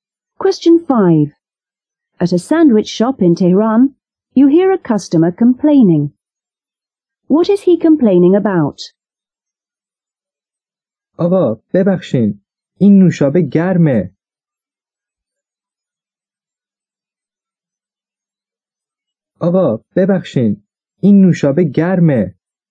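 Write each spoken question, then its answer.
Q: What is he complaining about?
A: The soft drink is warm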